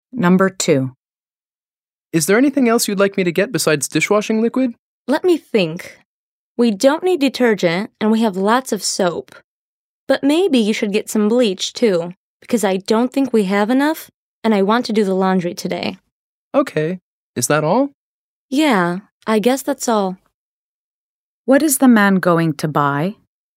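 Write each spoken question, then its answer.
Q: What is the man going to buy?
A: Dishwashing liquid and bleach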